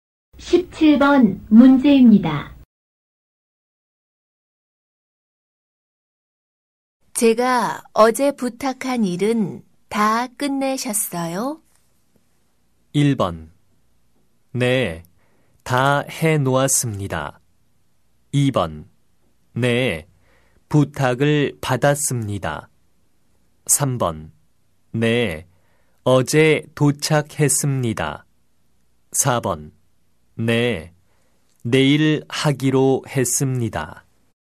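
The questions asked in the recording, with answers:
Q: 제가 어제 부탁한 일은 다 끝내셨어요?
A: 1: 네, 다 해놓았습니다.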